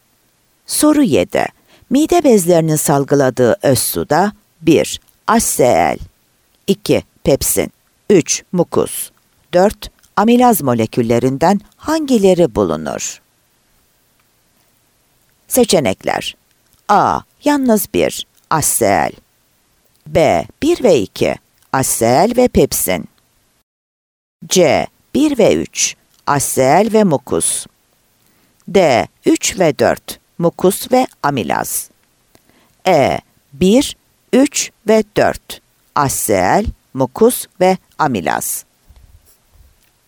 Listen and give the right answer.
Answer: Ceyhan